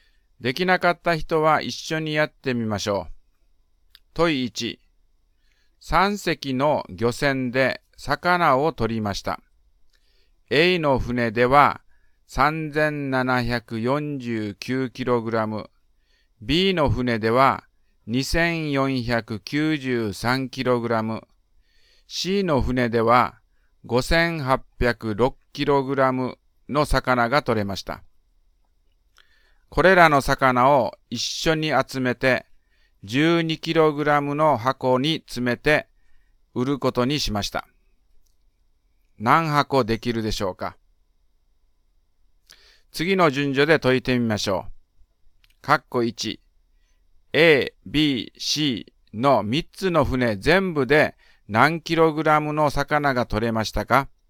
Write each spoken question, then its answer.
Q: A、B、C の3つの船全部で何 kg の魚が取れましたか?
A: 12048kg です